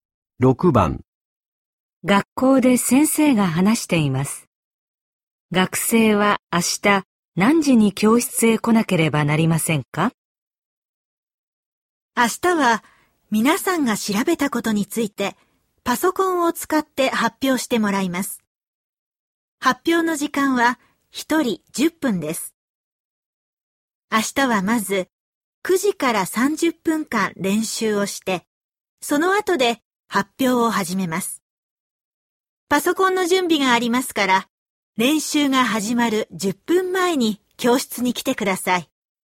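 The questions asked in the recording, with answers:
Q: 学生は明日何時に教室へ来なければなりませんか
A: 8時50分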